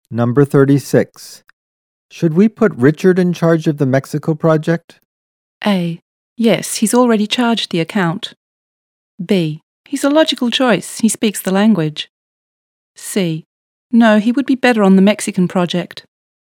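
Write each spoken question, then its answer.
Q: Should we put Richard in charge of the Mexico project?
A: B: He's a logical choice. He speaks the language.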